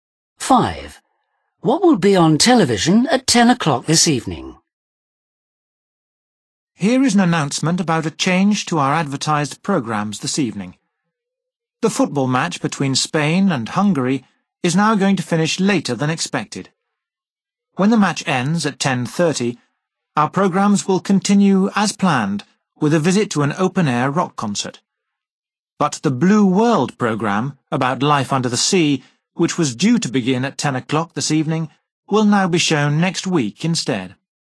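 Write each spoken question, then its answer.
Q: What will be on television at 10 o'clock this evening?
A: the football match (Spain v Hungary)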